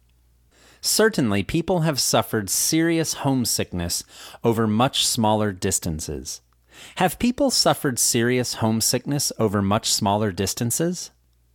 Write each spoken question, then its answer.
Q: Have people suffered serious homesickness over much smaller distances?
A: Yes, certainly. People have suffered serious homesickness over much smaller distances.